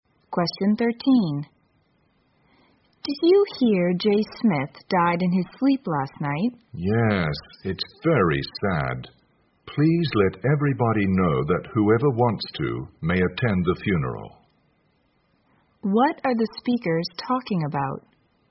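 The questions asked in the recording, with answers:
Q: What are the speakers talking about?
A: Jay Smith's death and funeral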